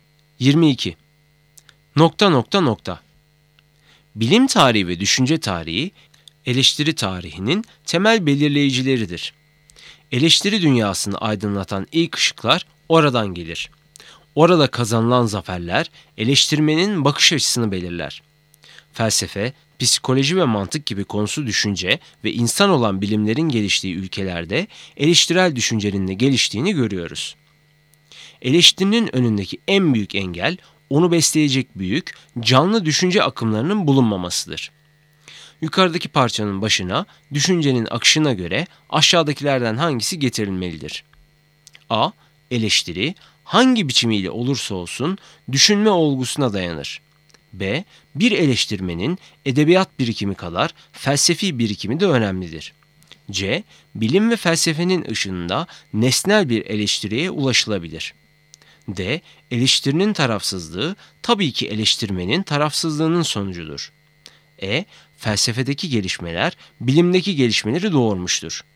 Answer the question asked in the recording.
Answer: Doğru cevap A. Eleştiri hangi biçimiyle olursa olsun düşünme olgusuna dayanır.